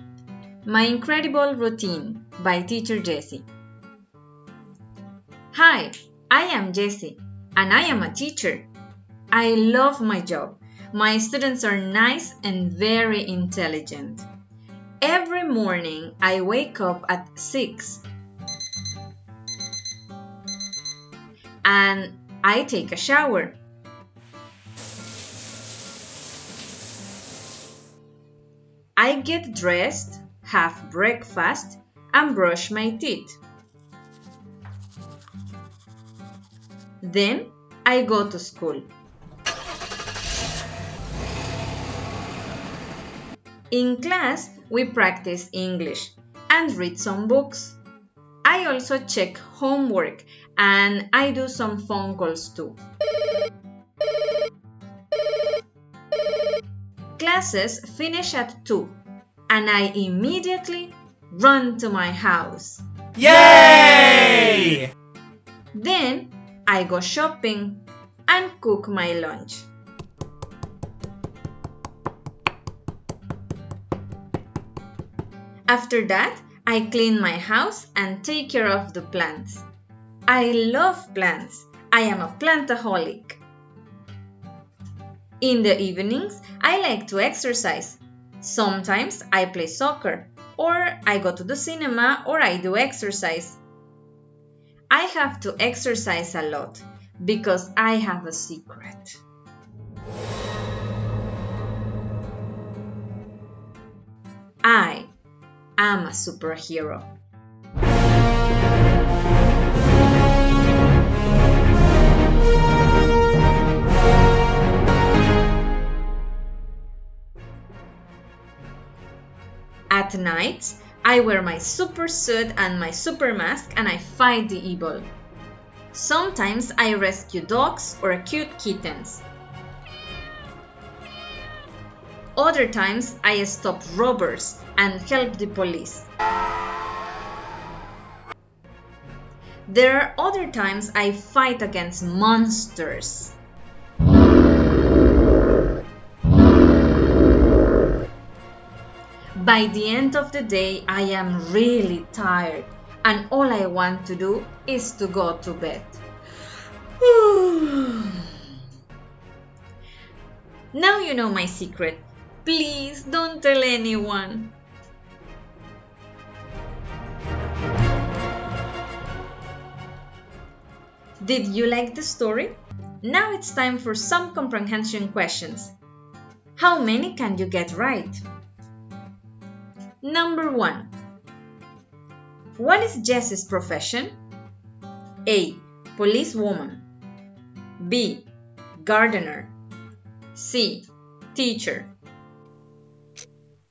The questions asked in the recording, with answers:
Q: What is Jess's profession?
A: Correct! She is a teacher and she loves her job.